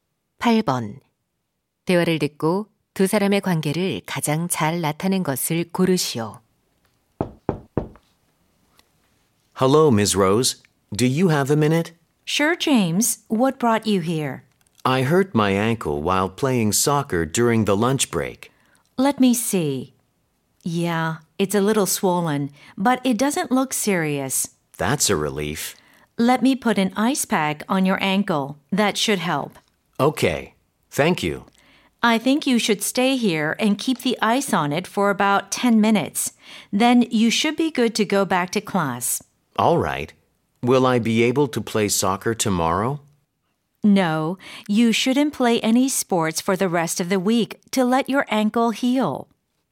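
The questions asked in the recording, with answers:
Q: 대화를 듣고 두 사람의 관계를 가장 잘 나타낸 것을 고르시오.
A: 보건 교사 - 학생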